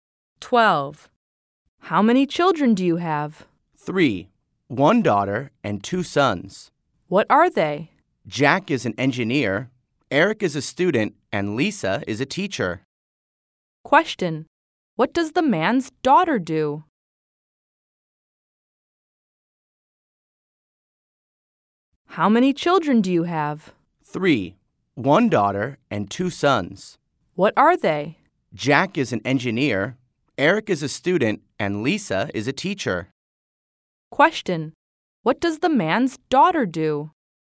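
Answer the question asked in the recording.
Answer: She is a teacher.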